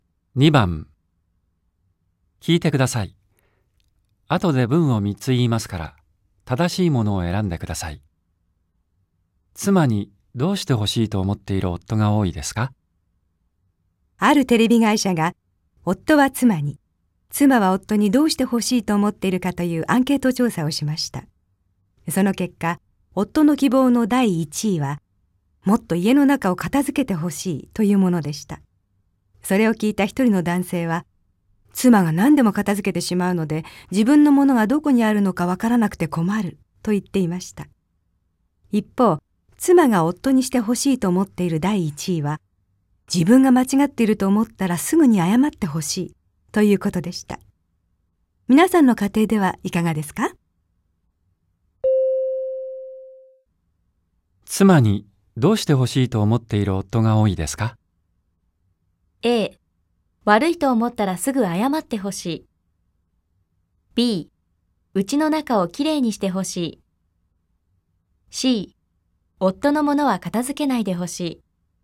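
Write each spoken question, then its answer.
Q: 妻にどうしてほしいと思っている夫が多いですか?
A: B: うちの中をきれいにしてほしい。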